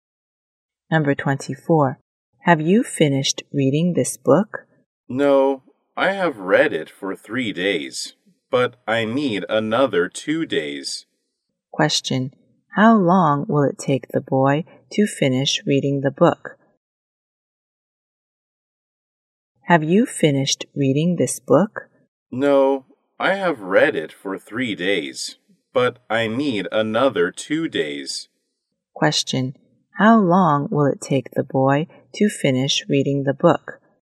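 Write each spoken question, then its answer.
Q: How long will it take the boy to finish reading the book?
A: 5 days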